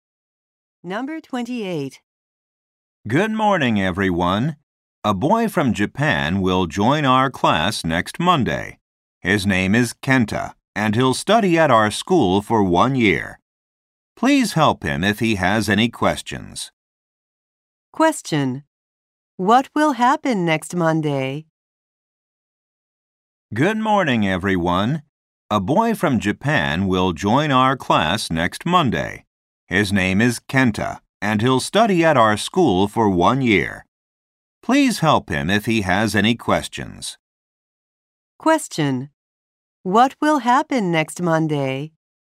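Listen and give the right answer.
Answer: A boy from Japan will join the class.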